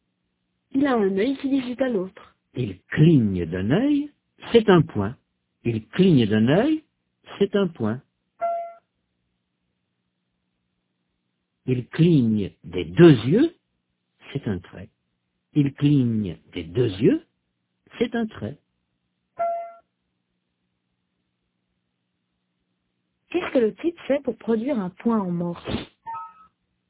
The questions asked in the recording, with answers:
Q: Qu'est-ce que le type fait pour produire un point en morse?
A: Il cligne d'un œil.